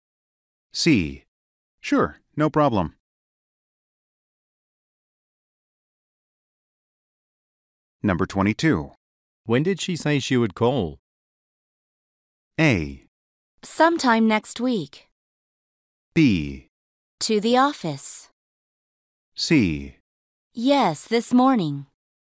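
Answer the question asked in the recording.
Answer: A: Sometime next week.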